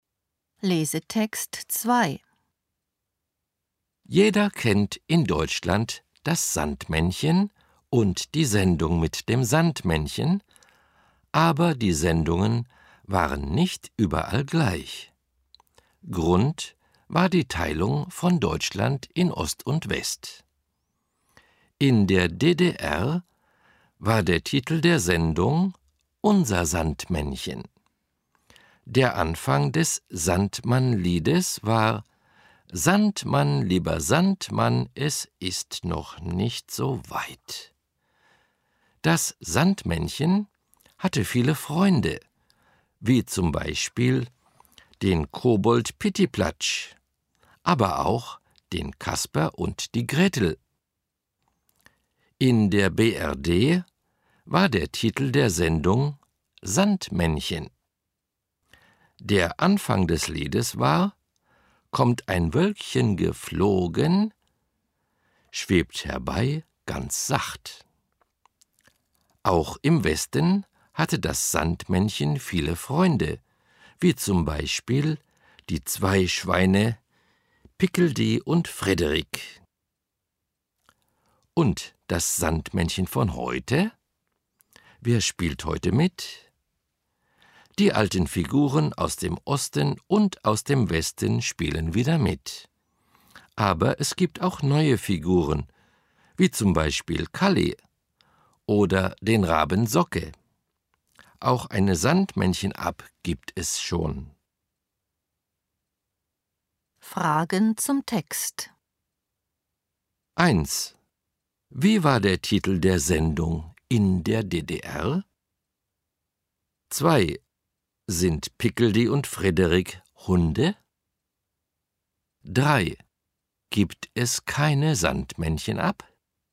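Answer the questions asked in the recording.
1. »Unser Sandmännchen«
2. Nein, sie sind Schweine.
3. Doch, es gibt schon eine Sandmännchen-App.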